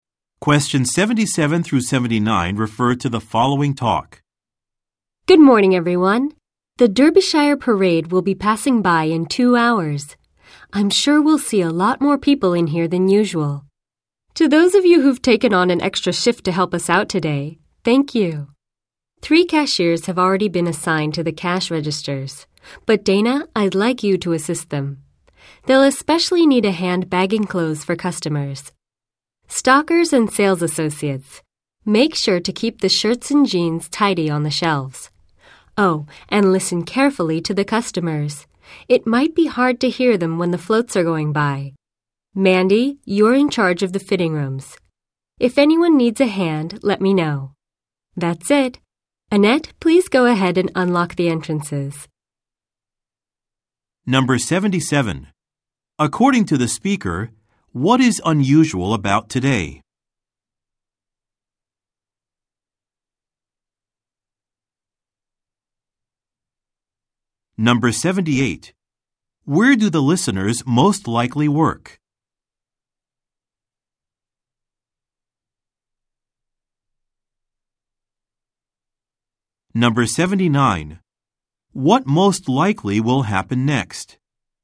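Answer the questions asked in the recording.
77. A parade is passing by, so more customers than usual are expected
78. At a clothing store
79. The store entrances will be unlocked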